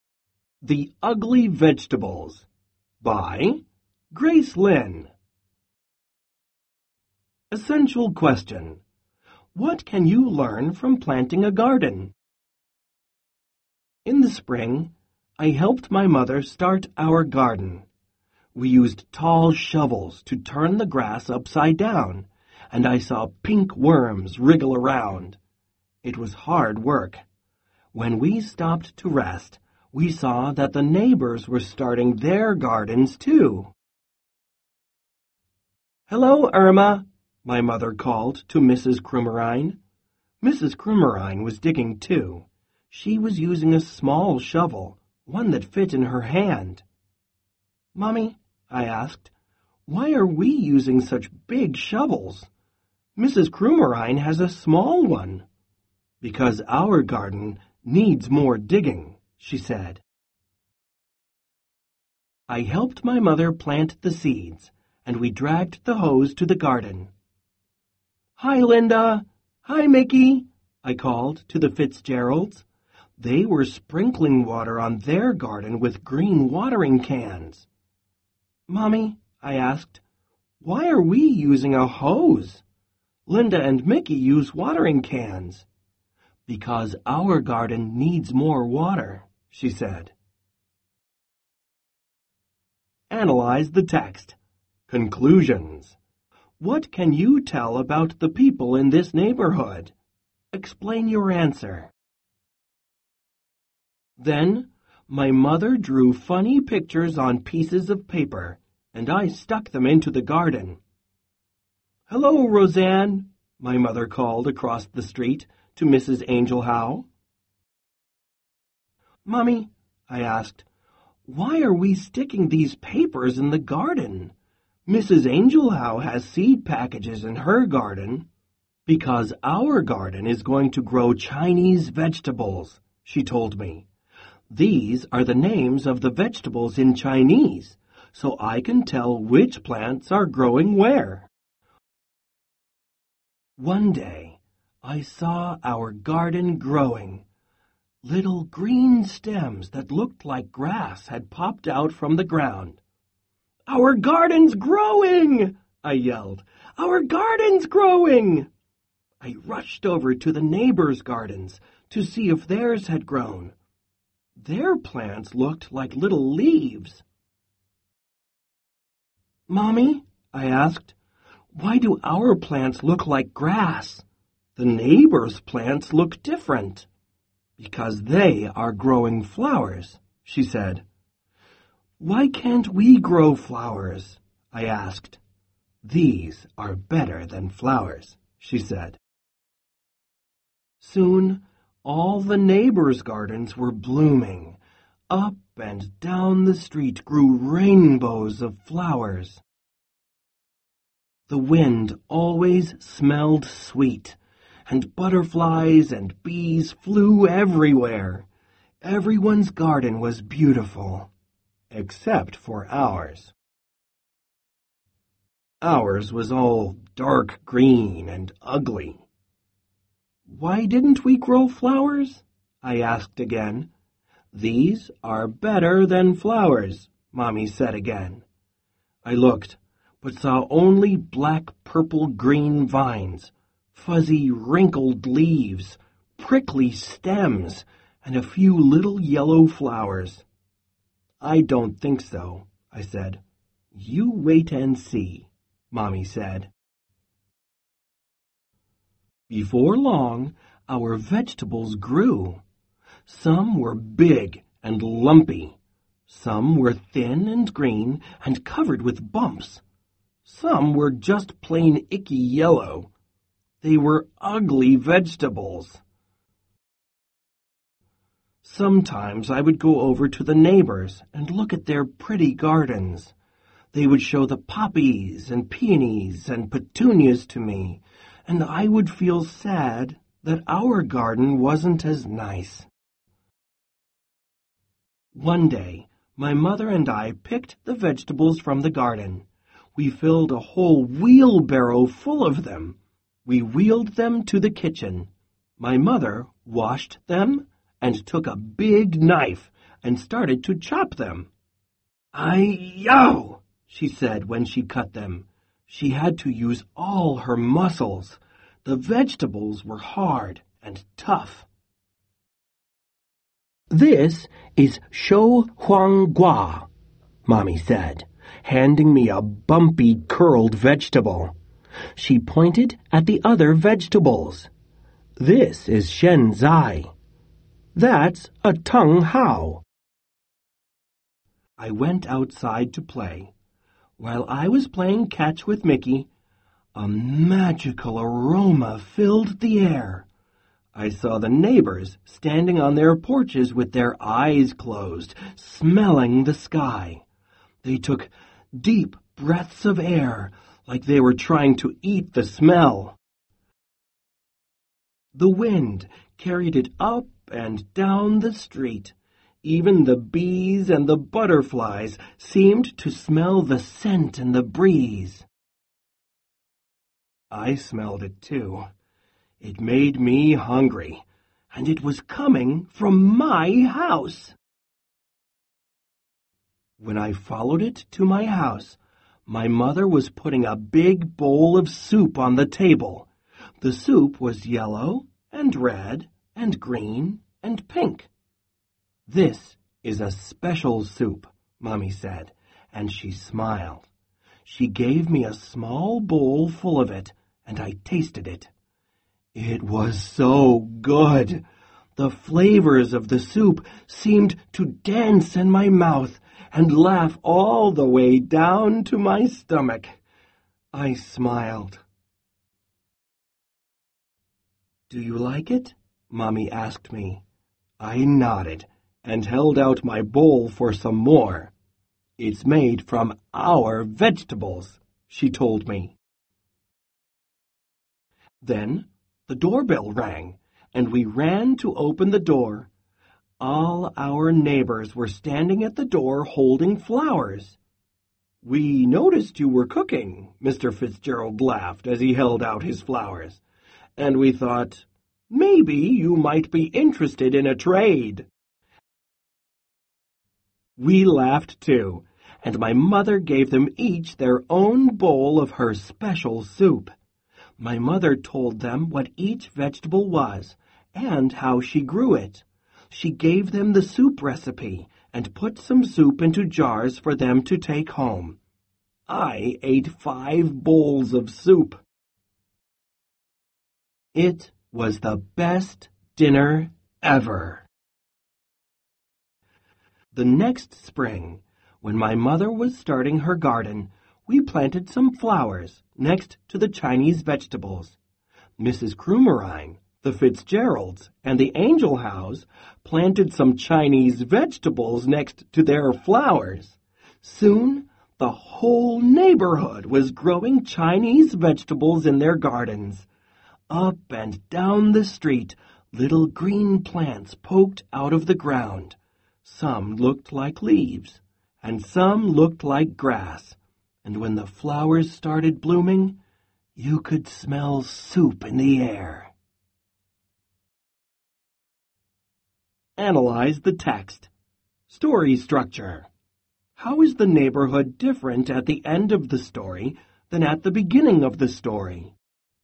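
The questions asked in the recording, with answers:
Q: How is the neighborhood different at the end of the story than at the beginning of the story?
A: At the end everyone grows both flowers and Chinese vegetables and they share with each other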